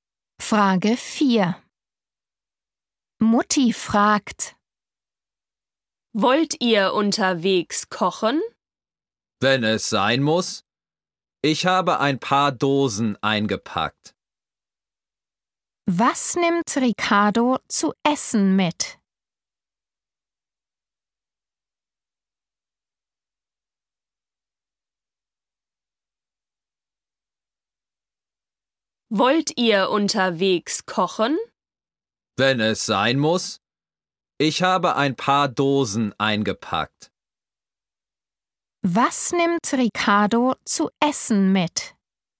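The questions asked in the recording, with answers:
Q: Was nimmt Ricardo zu essen mit?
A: ein paar Dosen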